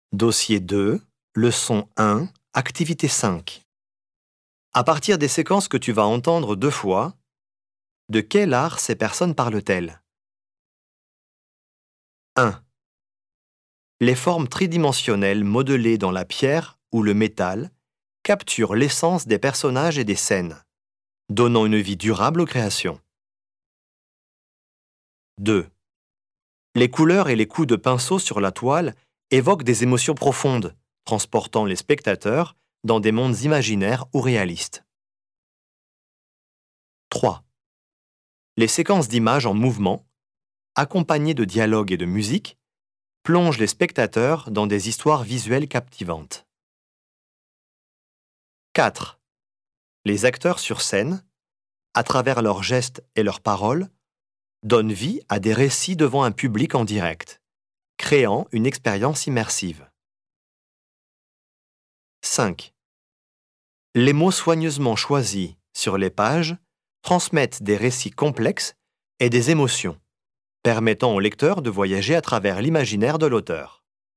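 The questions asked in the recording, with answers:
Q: De quel art ces personnes parlent-elles?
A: la sculpture

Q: De quel art ces personnes parlent-elles?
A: la peinture

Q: De quel art ces personnes parlent-elles?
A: le cinéma

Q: De quel art ces personnes parlent-elles?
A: le théâtre

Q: De quel art ces personnes parlent-elles?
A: la littérature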